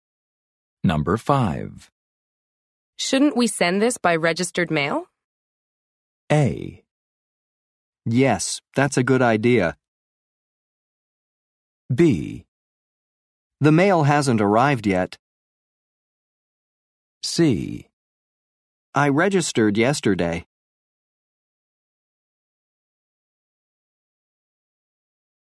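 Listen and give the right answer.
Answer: A: Yes, that's a good idea.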